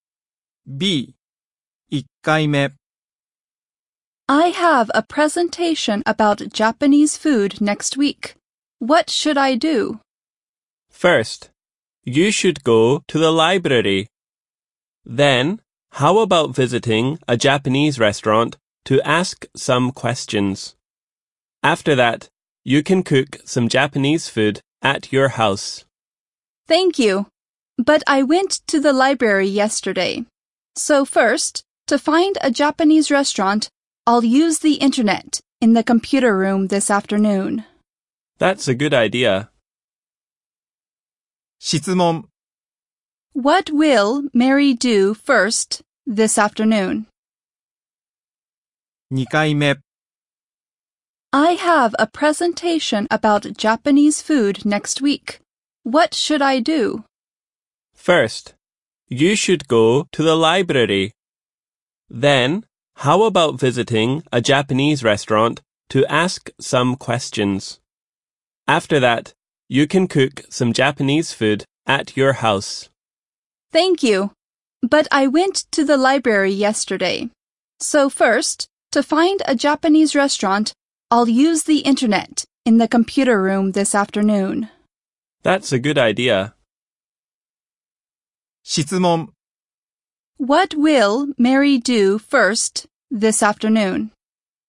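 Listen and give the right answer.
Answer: Use the internet in the computer room to find a Japanese restaurant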